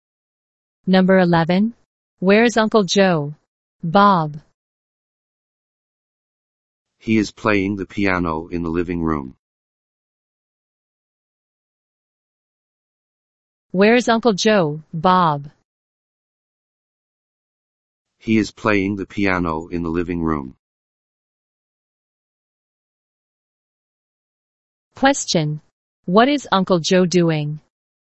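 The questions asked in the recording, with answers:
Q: What is Uncle Joe doing?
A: He is playing the piano.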